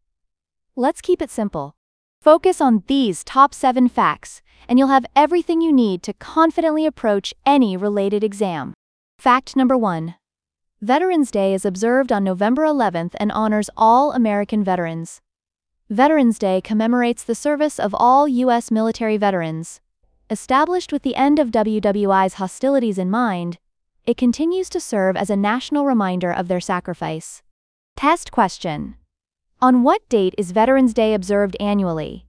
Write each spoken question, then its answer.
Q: On what date is Veterans Day observed annually?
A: November 11th.